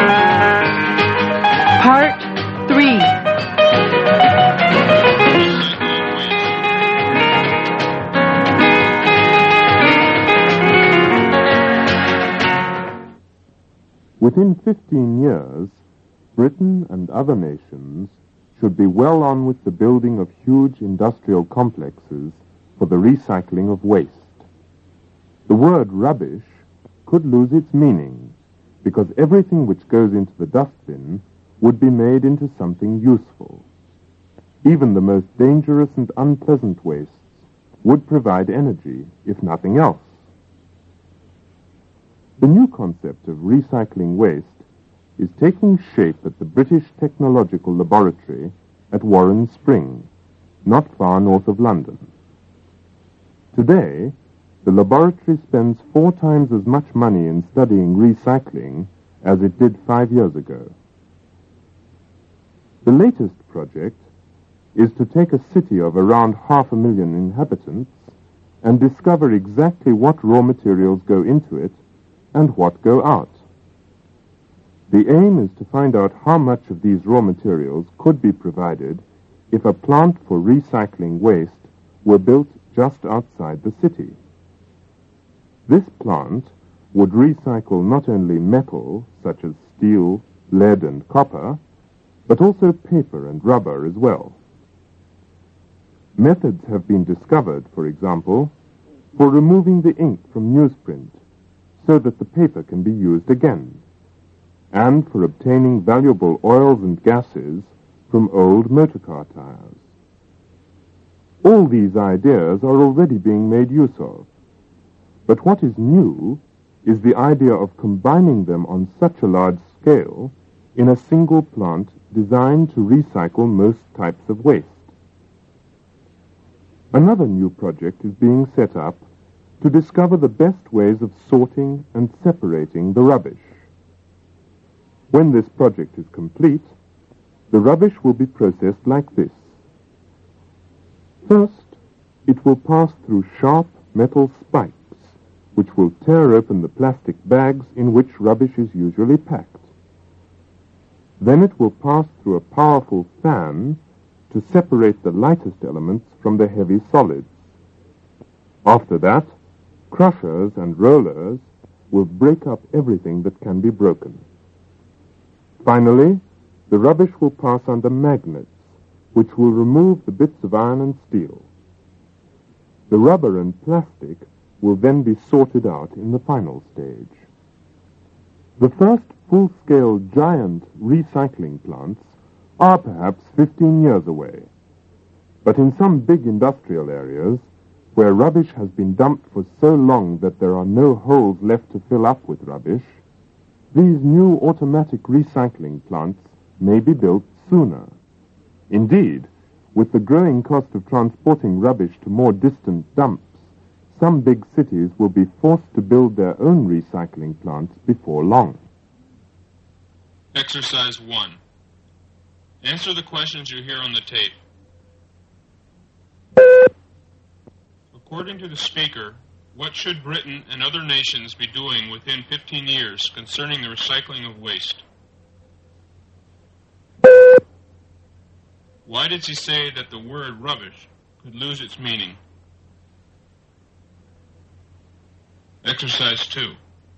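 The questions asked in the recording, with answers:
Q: According to the speaker, what should Britain and other nations be doing within 15 years concerning the recycling of waste?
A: Be well on with building huge industrial complexes for recycling waste

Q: Why did he say that the word rubbish could lose its meaning?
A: Because everything going into the dustbin would be made into something useful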